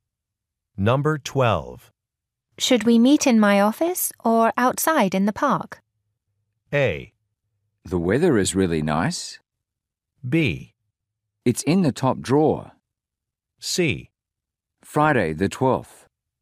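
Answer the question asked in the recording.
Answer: A: The weather is really nice.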